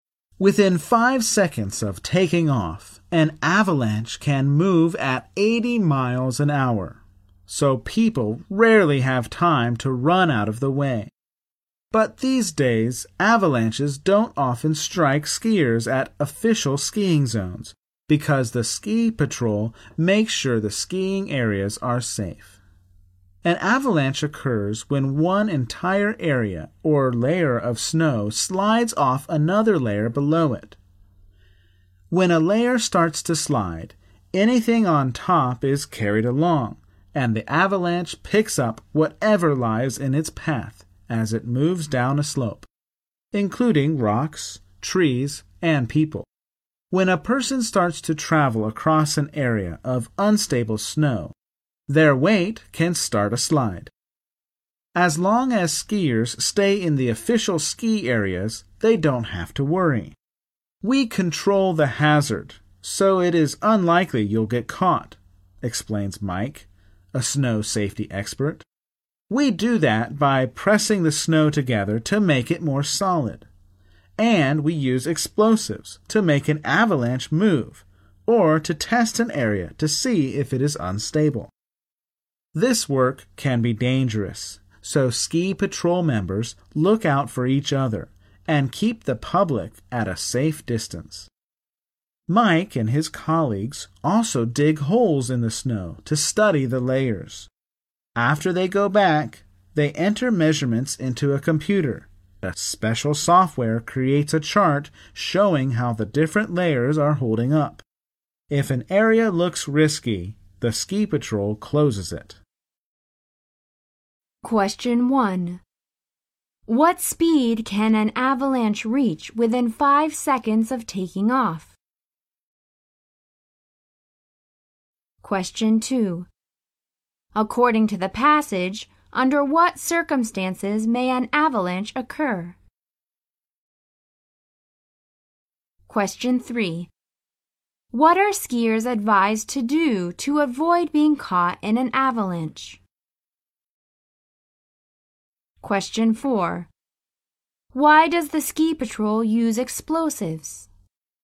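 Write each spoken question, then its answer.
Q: What speed can an avalanche reach within 5 seconds of taking off?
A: 80 miles an hour

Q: According to the passage, under what circumstances may an avalanche occur?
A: When one area or layer of snow slides off another layer below it

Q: What are skiers advised to do to avoid being caught in an avalanche?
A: Stay in the official ski areas

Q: Why does the ski patrol use explosives?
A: To make an avalanche move or to test whether an area is unstable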